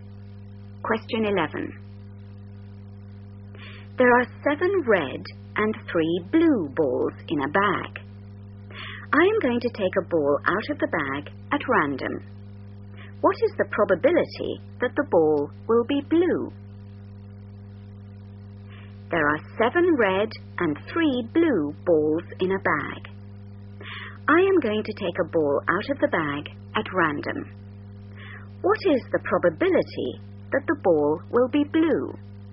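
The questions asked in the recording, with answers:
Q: What is the probability that the ball will be blue?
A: 3/10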